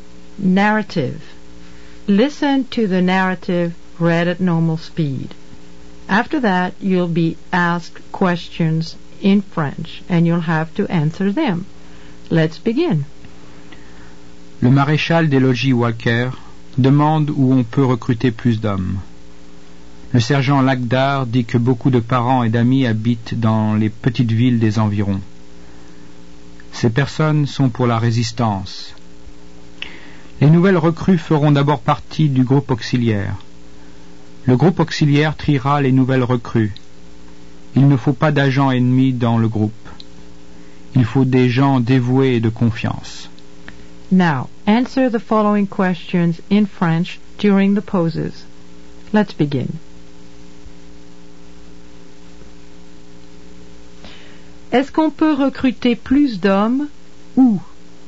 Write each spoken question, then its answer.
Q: Est-ce qu'on peut recruter plus d'hommes ou?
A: On peut recruter plus d'hommes dans les petites villes des environs.